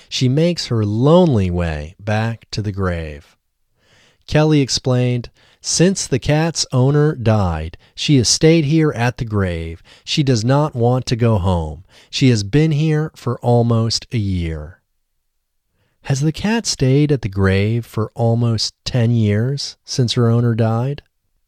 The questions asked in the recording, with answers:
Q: Has the cat stayed at the grave for almost 10 years since her owner died?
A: No, the cat hasn't stayed at the grave for almost 10 years since her owner died.